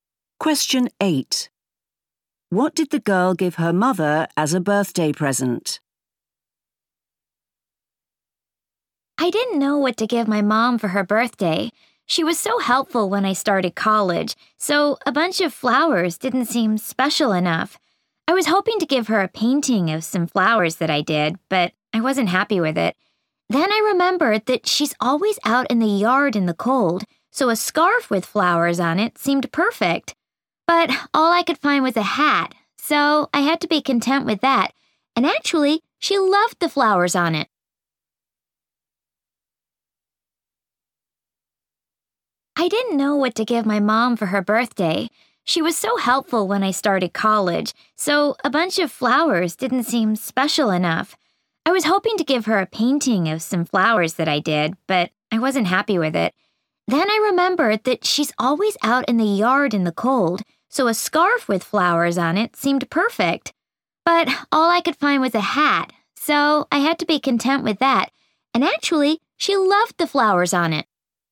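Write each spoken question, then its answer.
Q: What did the girl give her mother as a birthday present?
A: a hat with flowers on it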